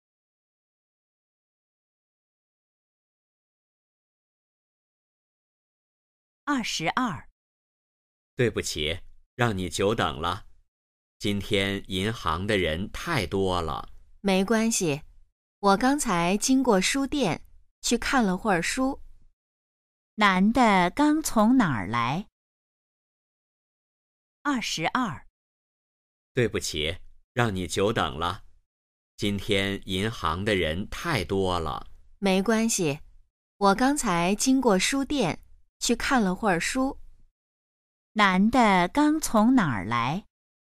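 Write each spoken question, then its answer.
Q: 男的刚从哪儿来?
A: 书店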